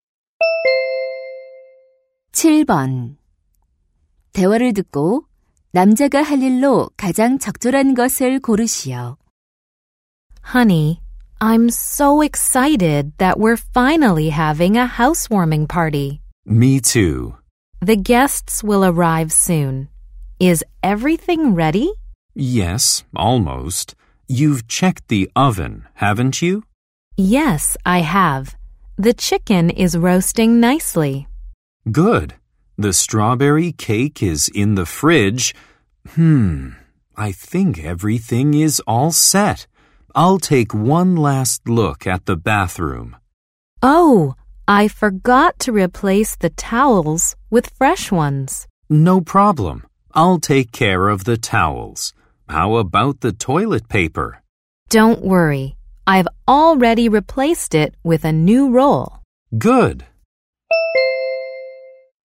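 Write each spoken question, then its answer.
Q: 대화를 듣고 남자가 할 일로 가장 적절한 것을 고르시오.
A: 욕실 수건 교체하기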